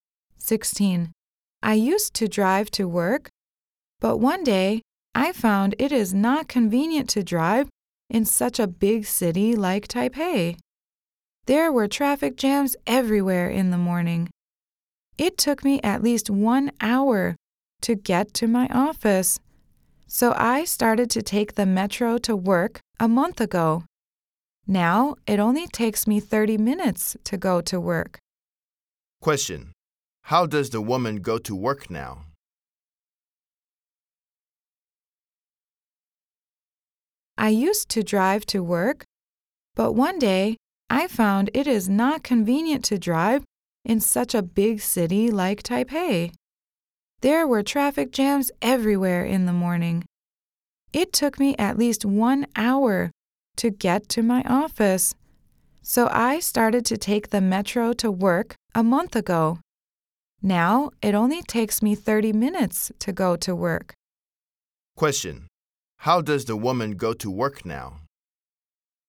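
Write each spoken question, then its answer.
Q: Question. How does the woman go to work now?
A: She takes the metro.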